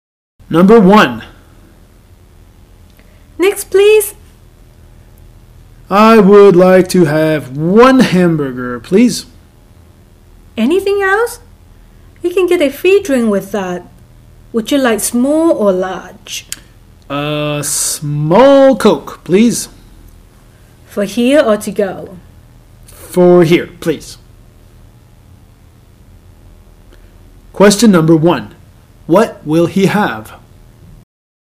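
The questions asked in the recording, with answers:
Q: What will he have?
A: One hamburger and a small Coke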